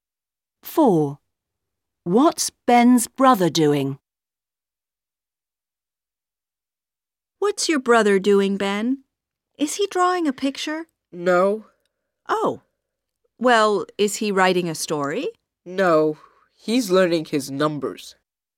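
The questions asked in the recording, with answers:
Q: What's Ben's brother doing?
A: learning his numbers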